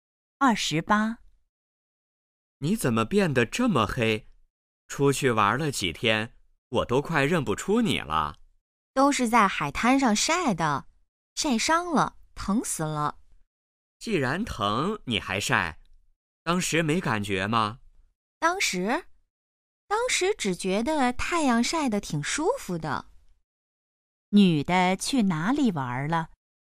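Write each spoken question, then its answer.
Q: 女的去哪里玩了?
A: 海滩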